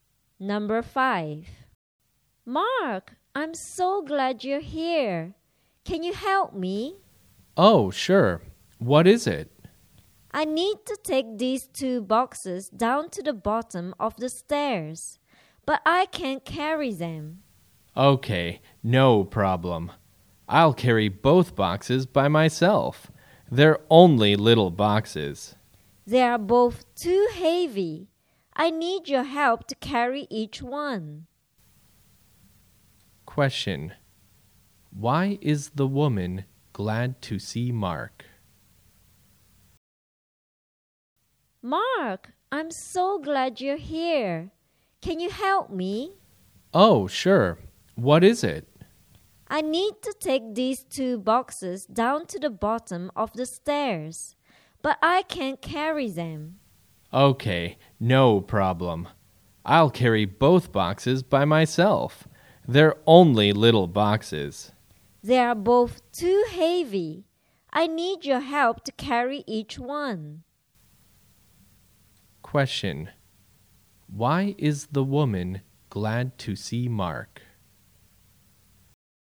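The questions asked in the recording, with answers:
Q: Why is the woman glad to see Mark?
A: She needs his help to carry two heavy boxes down the stairs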